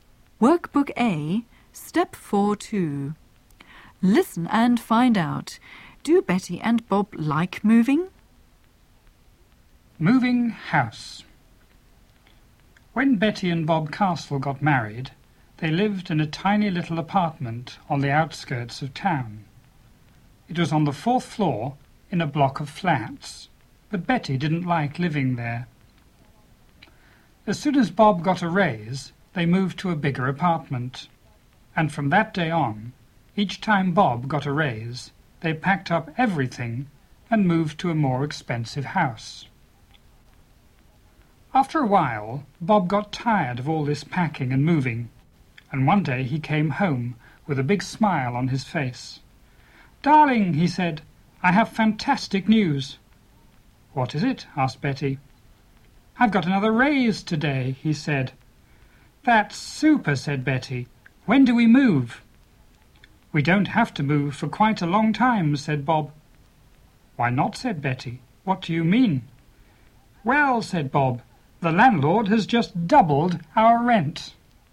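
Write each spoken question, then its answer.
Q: Do Betty and Bob like moving?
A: No, not both: Betty likes moving, but Bob is tired of packing and moving.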